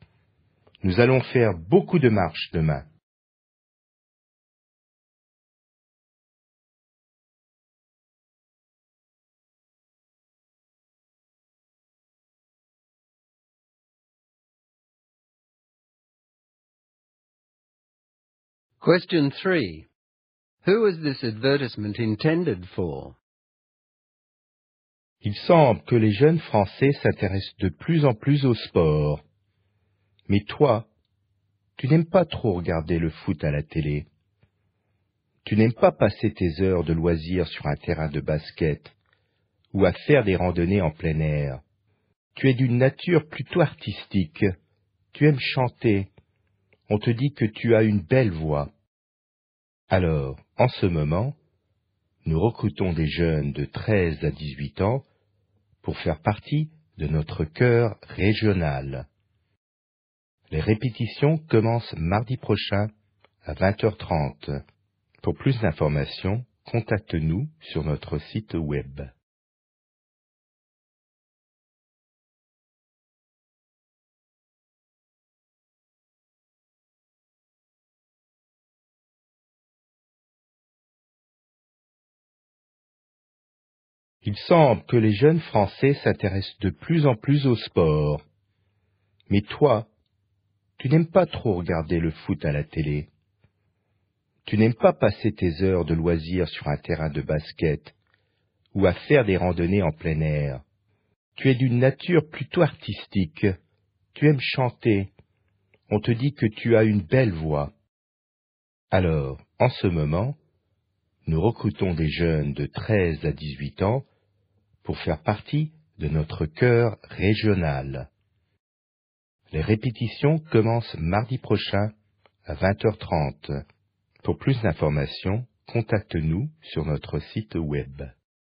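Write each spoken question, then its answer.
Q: Who was this advertisement intended for?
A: Young people aged 13 to 18 who are artistic, like singing and are not into sport (recruits for a regional choir).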